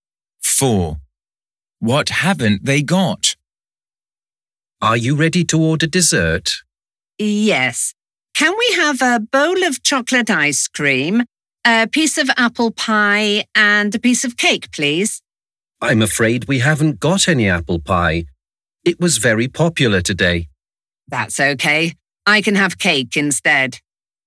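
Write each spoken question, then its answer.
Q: What haven't they got?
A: apple pie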